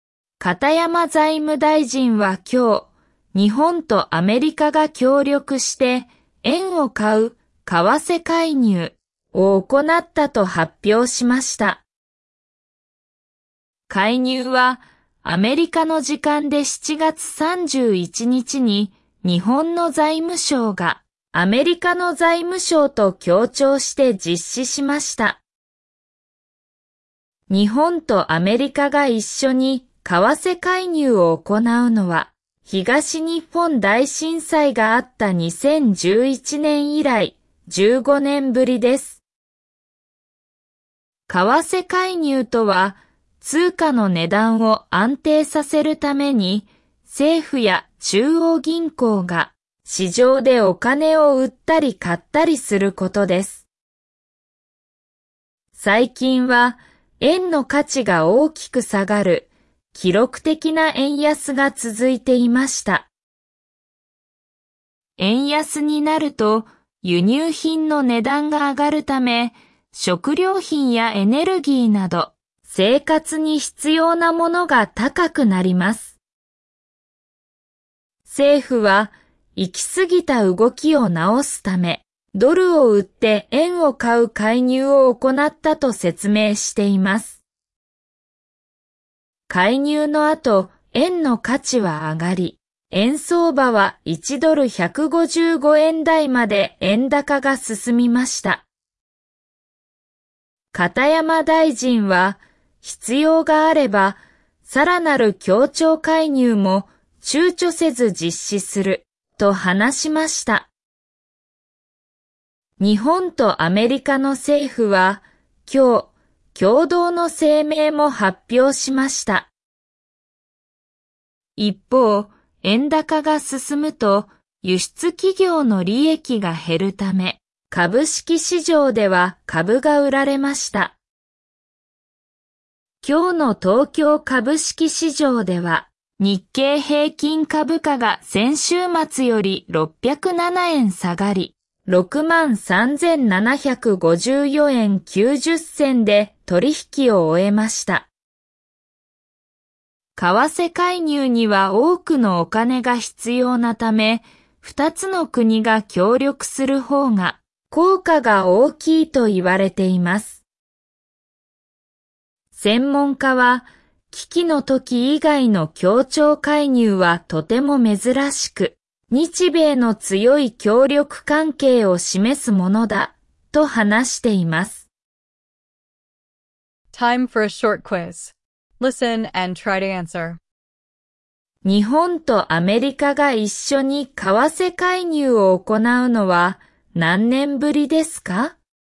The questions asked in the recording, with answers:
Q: 日本とアメリカが一緒に為替介入を行うのは何年ぶりですか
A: 15 years, the first time since 2011, the year of the great earthquake.